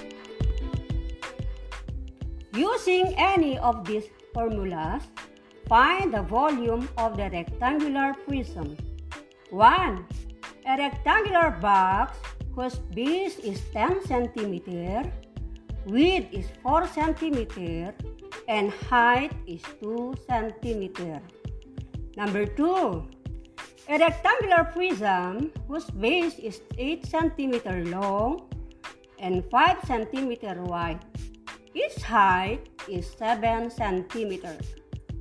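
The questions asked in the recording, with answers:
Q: A rectangular box whose base is 10 cm, width is 4 cm, and height is 2 cm.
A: 80 cubic centimeters

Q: A rectangular prism whose base is 8 cm long and 5 cm wide.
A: 280 cubic centimeters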